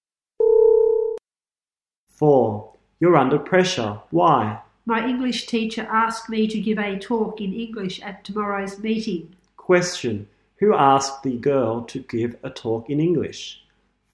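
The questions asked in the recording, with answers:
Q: Question, who asked the girl to give a talk in English?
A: Her English teacher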